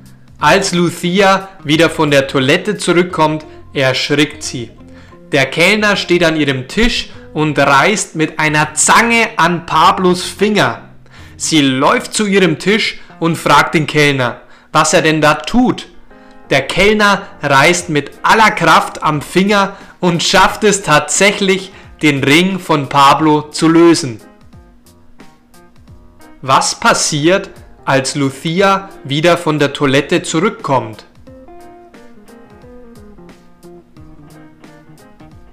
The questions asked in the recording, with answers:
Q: Was passiert, als Lucia wieder von der Toilette zurückkommt?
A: Sie erschrickt. Lucia erschrickt.